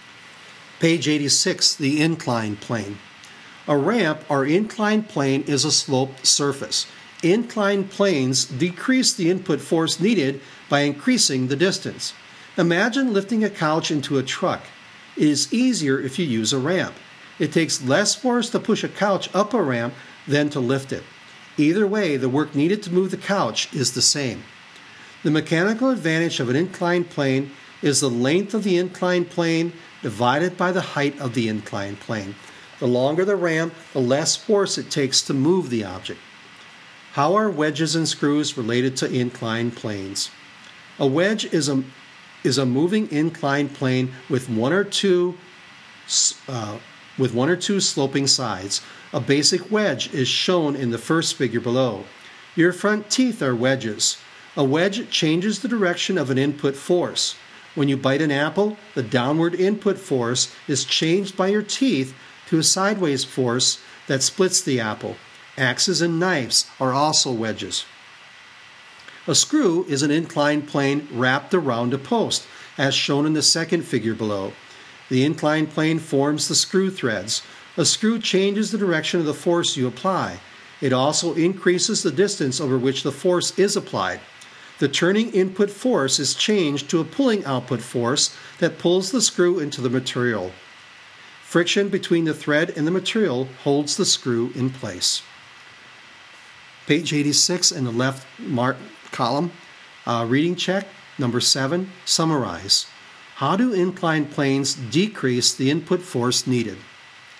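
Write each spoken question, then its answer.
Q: How do inclined planes decrease the input force needed?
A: By increasing the distance over which the force is applied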